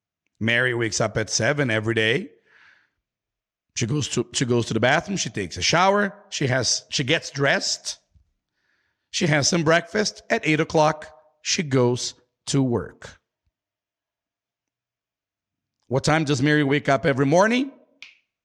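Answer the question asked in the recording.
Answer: At seven o'clock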